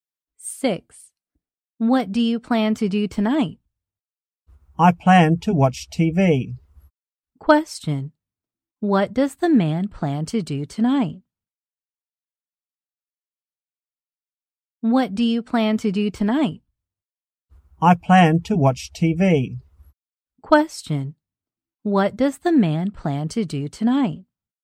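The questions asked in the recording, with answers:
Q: What does the man plan to do tonight?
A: Watch TV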